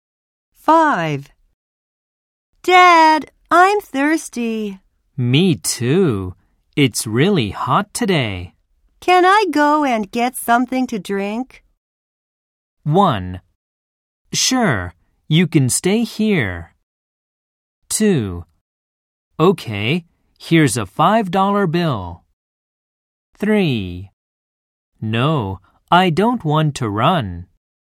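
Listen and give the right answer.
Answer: 2: Okay, here's a $5 bill.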